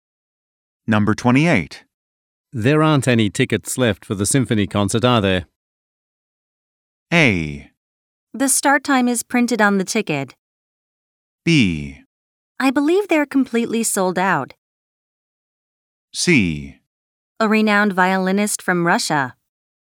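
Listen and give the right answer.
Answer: B: I believe they're completely sold out.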